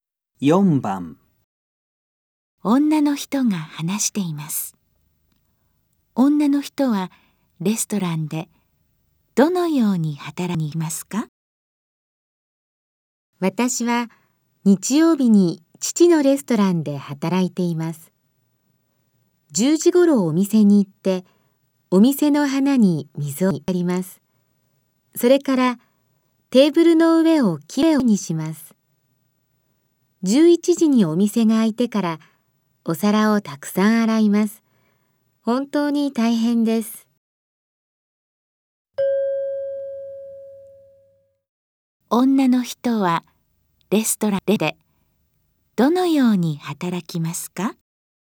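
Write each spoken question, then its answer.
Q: 女の人はレストランでどのように働きますか?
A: 花に水をやり、テーブルの上をきれいにしてから、お皿をたくさん洗います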